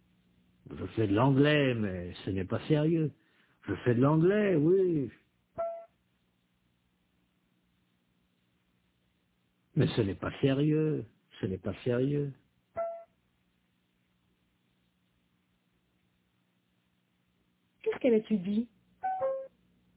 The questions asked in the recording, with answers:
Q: Qu'est-ce qu'elle étudie?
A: L'anglais, mais ce n'est pas sérieux.